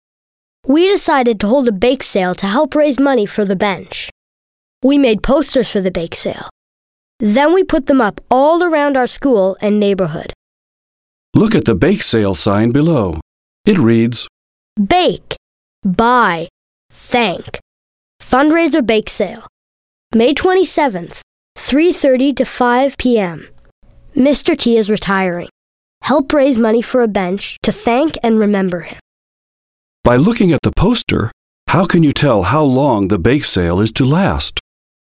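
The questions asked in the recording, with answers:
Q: By looking at the poster, how can you tell how long the bake sale is to last?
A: It runs from 3:30 to 5 p.m., so an hour and a half.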